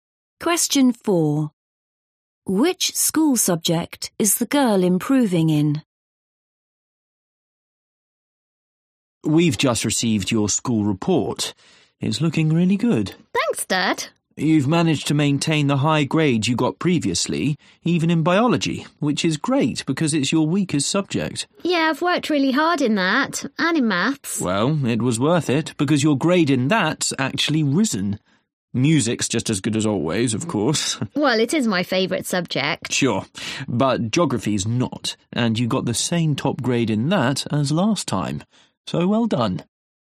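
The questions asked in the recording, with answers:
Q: Which school subject is the girl improving in?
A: Maths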